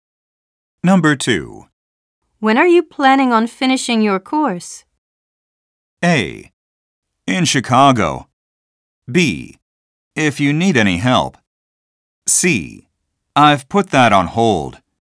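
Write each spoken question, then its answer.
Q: When are you planning on finishing your course?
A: C: I've put that on hold.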